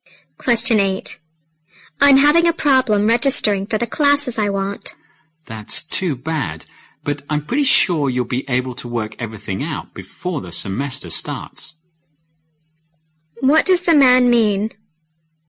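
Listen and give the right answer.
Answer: The registration problem will likely be solved before the semester starts.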